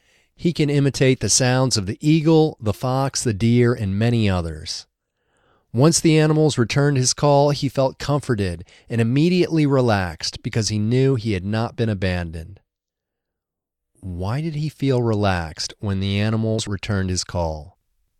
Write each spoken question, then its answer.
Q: Why did he feel relaxed when the animals returned his call?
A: He felt relaxed because he knew he had not been abandoned.